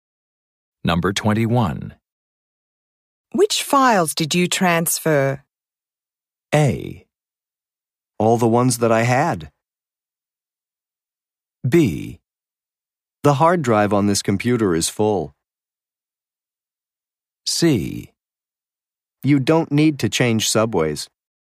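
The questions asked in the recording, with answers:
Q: Which files did you transfer?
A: A: All the ones that I had.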